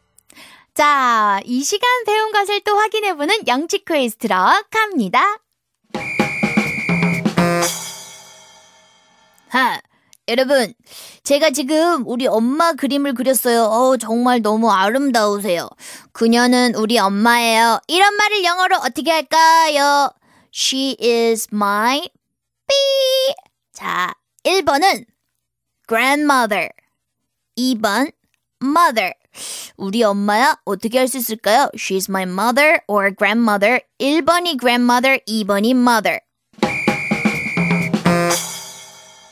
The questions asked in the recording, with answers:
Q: 이런 말을 영어로 어떻게 할까요? She is my 삐.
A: 그러면 mother이니까 바로 2번이 되겠죠? She is my mother 이렇게 해야 되죠?